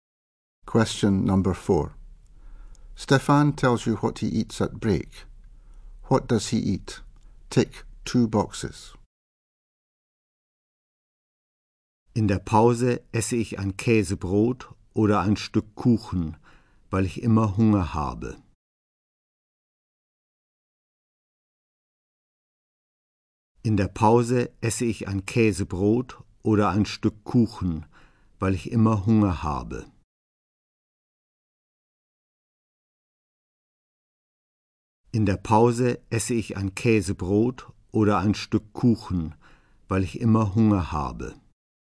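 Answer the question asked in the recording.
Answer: A cheese sandwich or a piece of cake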